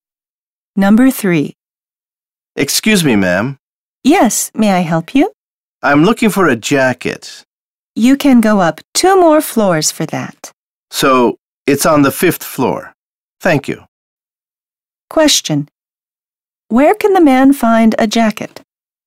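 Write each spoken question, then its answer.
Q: Where can the man find a jacket?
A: On the 5th floor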